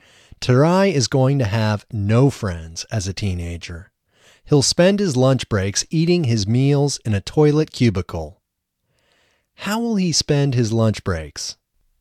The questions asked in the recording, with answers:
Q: How will he spend his lunch breaks?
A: He will spend his lunch breaks eating his meals in a toilet cubicle.